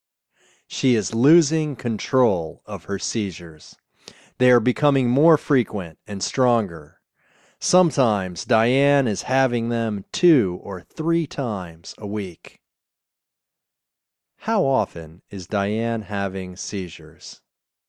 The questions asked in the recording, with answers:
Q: How often is Diane having seizures?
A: She is having seizures 2 or 3 times a week.